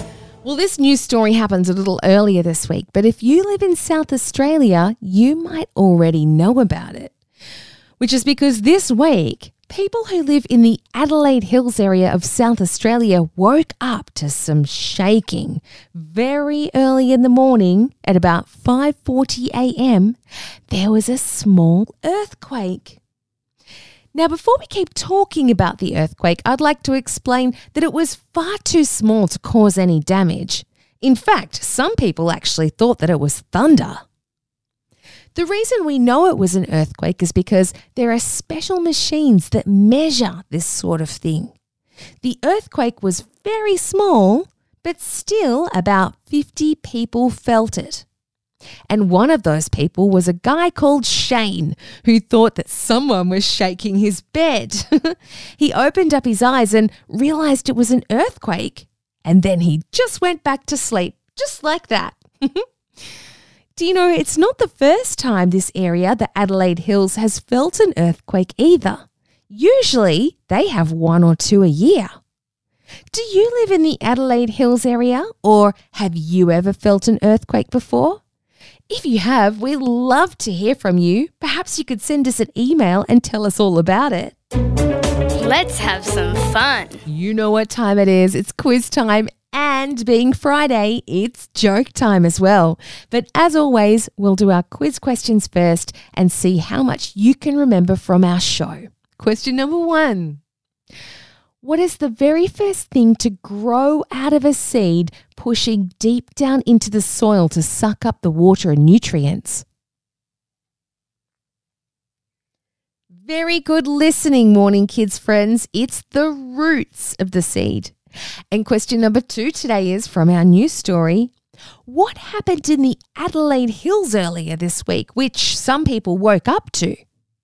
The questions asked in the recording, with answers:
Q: What happened in the Adelaide Hills earlier this week, which some people woke up to?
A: It was a little earthquake.